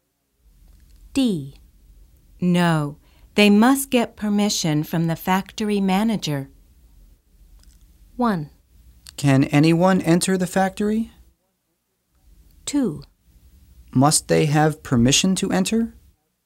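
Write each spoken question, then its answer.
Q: No, they must get permission from the factory manager.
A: 1: Can anyone enter the factory?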